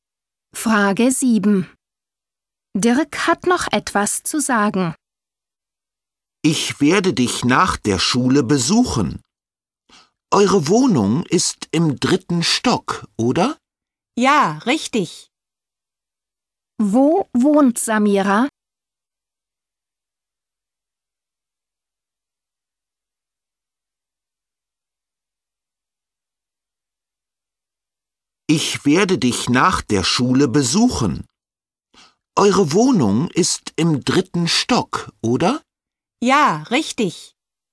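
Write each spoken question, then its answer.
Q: Wo wohnt Samira?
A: Im dritten Stock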